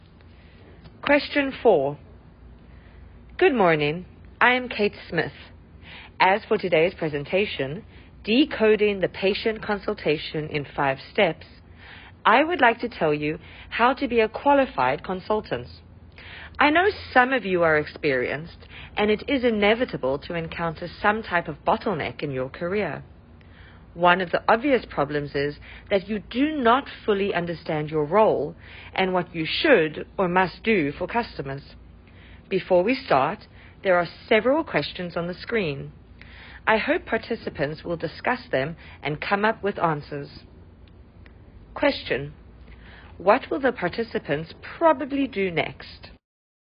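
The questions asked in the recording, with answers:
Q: What will the participants probably do next?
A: Discuss the questions on the screen and come up with answers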